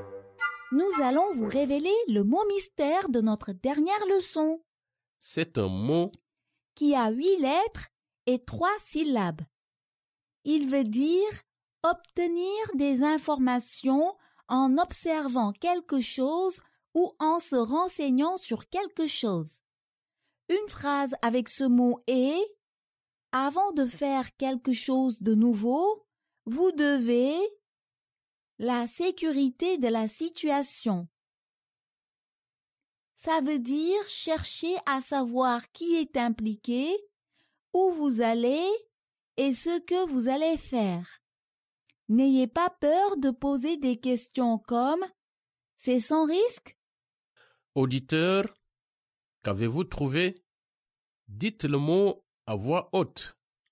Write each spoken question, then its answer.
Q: Auditeur, qu'avez-vous trouvé?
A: Le mot mystère d'aujourd'hui est « vérifier ».